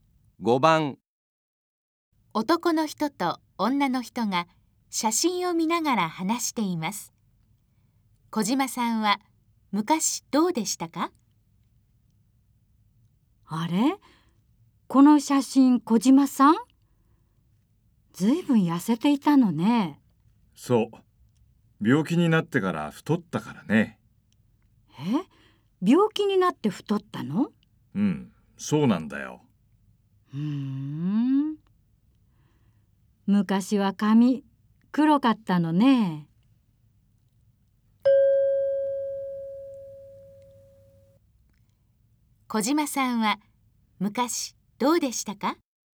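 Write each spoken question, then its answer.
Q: 小島さんは昔どうでしたか?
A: 痩せていて、髪が黒かった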